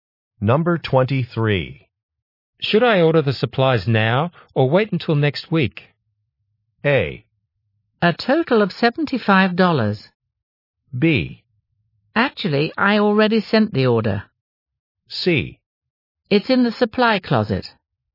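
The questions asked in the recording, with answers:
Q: Should I order the supplies now or wait until next week?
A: B: Actually, I already sent the order.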